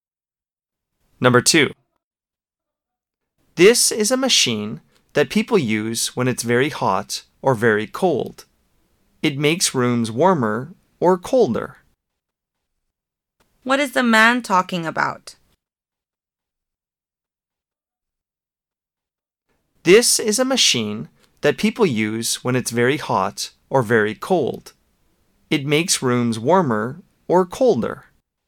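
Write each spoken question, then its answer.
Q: What is the man talking about?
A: An air conditioner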